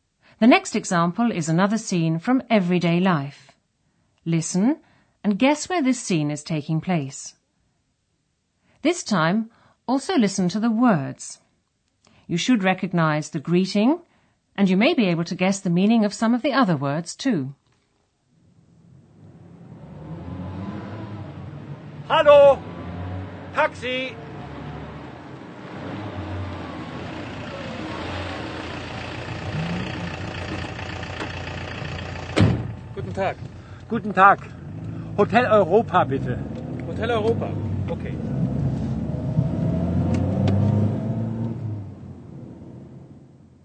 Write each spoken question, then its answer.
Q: Listen and guess where this scene is taking place.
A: A man is on the street. He hails a taxi, which is the same word in German, and tells the driver he wants to go to a hotel.